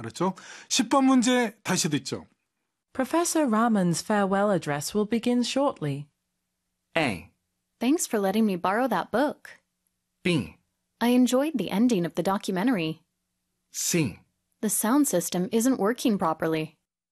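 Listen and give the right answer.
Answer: C: The sound system isn't working properly.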